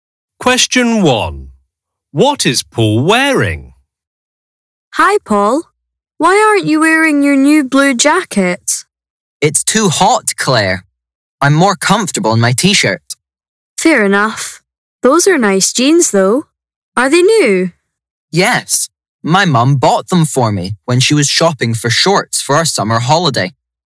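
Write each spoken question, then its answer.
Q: What is Paul wearing?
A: a t-shirt and jeans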